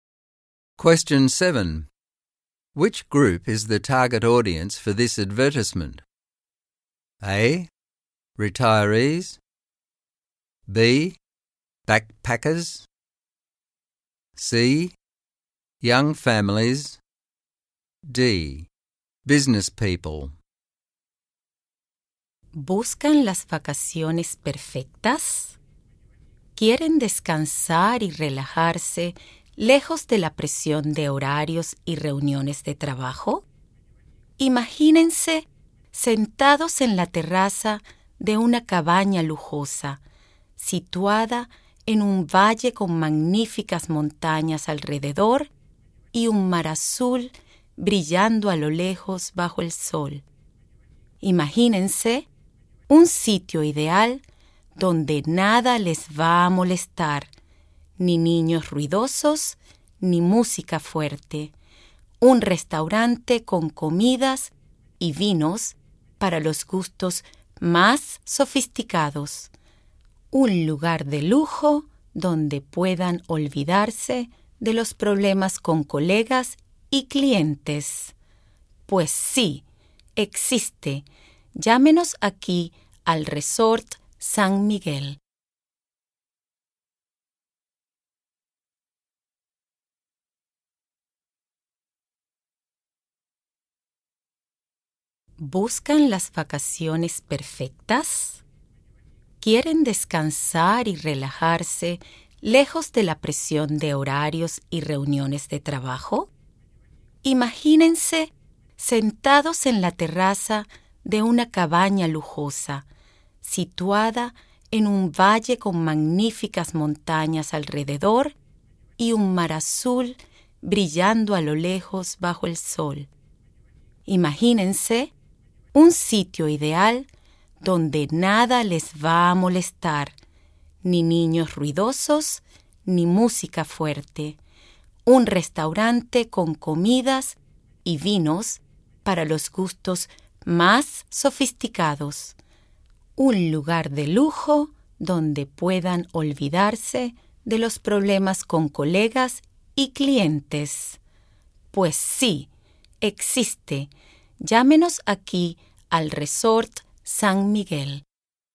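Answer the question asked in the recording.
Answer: D: Business people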